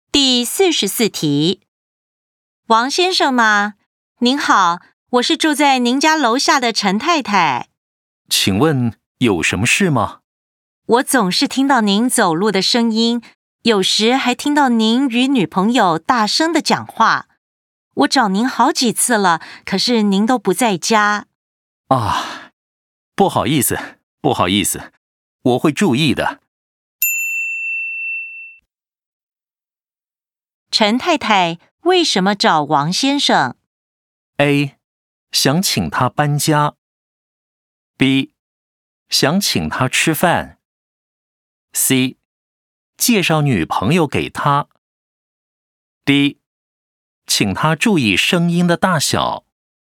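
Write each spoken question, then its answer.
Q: 陈太太为什么找王先生?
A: D: 请他注意声音的大小。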